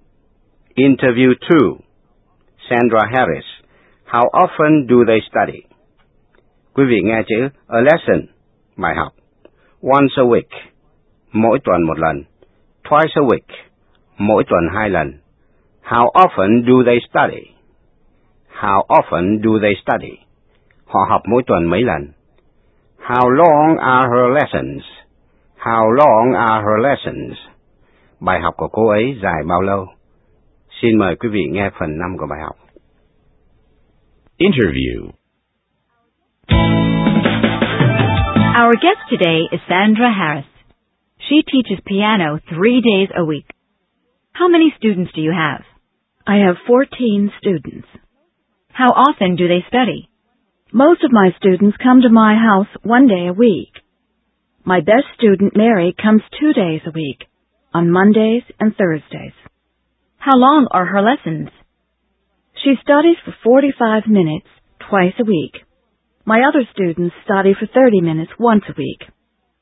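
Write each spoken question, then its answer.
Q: How often do they study?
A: Most students once a week; Mary twice a week

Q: How long are her lessons?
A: 45 minutes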